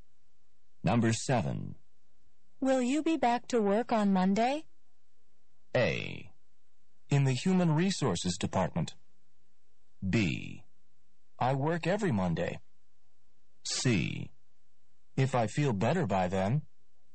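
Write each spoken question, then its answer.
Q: Will you be back to work on Monday?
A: C: If I feel better by then.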